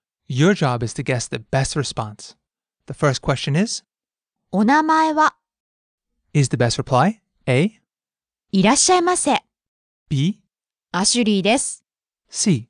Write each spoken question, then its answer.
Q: お名前は?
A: B, アシュリーです?